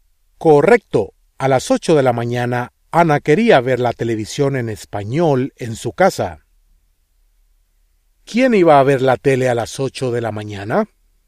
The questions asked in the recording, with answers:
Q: ¿Quién iba a ver la tele a las 8 de la mañana?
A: Ana.